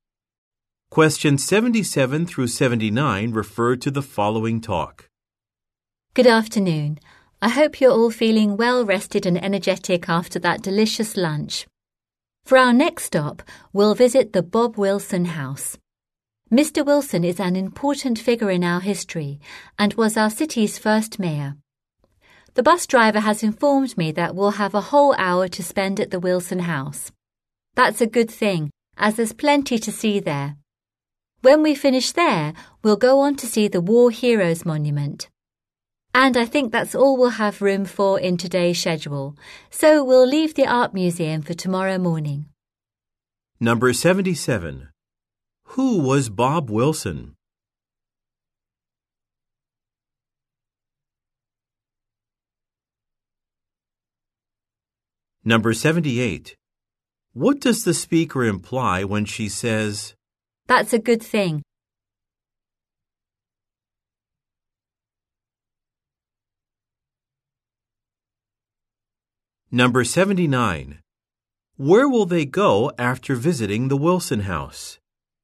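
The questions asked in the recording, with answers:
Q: Who was Bob Wilson?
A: The city's first mayor

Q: What does the speaker imply when she says,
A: There is a lot to see, so an hour is needed

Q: Where will they go after visiting the Wilson House?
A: The War Heroes Monument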